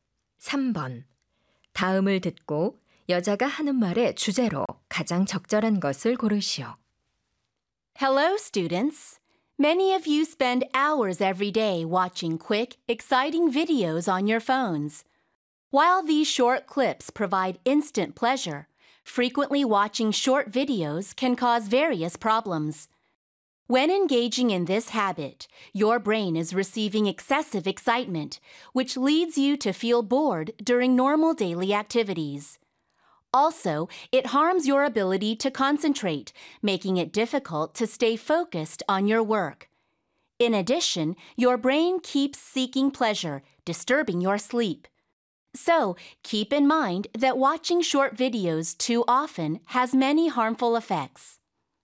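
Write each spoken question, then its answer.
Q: 다음을 듣고 여자가 하는 말의 주제로 가장 적절한 것을 고르시오.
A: 짧은 영상을 자주 시청하는 것의 해로운 영향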